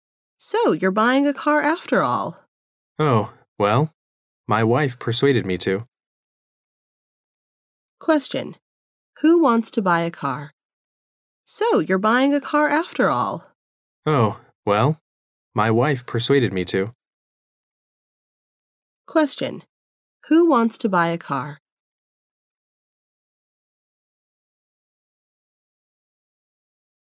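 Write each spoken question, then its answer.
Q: Who wants to buy a car?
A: The man's wife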